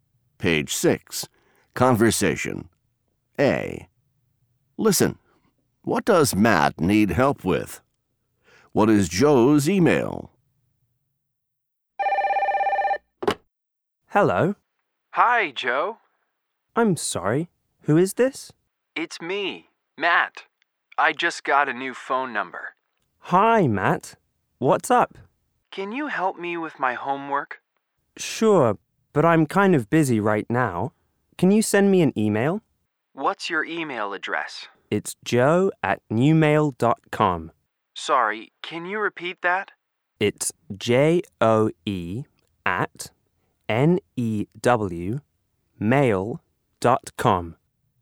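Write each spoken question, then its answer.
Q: What does Matt need help with?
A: His homework

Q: What is Joe's email?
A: joe@newmail.com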